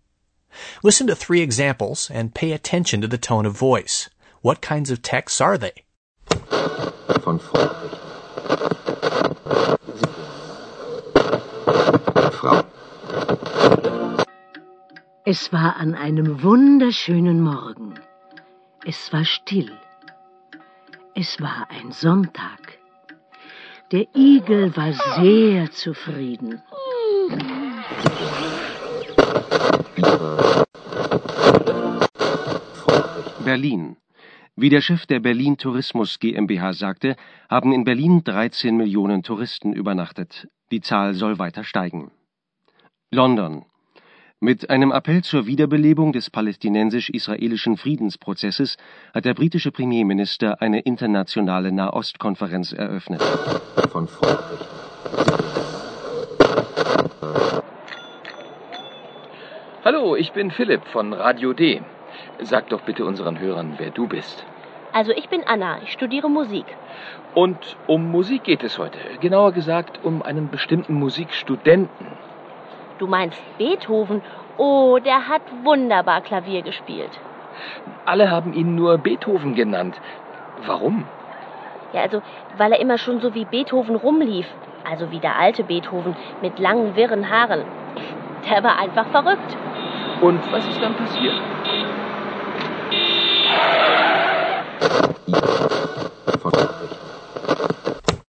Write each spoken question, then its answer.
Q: What kinds of texts are they?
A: That text was a fairy tale that was meant to capture the listeners and transport them into a fantasy world.